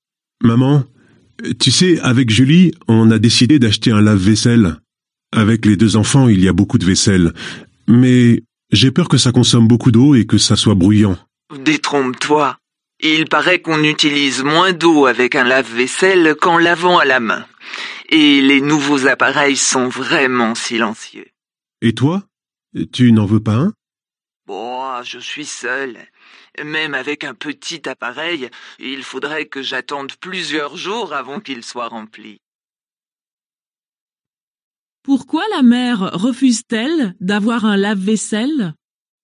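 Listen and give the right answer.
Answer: Elle vit seule et n'a pas assez de vaisselle pour le remplir rapidement.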